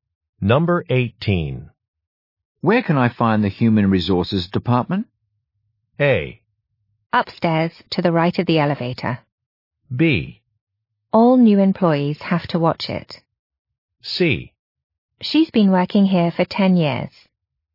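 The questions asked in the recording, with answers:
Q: Where can I find the human resources department?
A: A: Upstairs, to the right of the elevator.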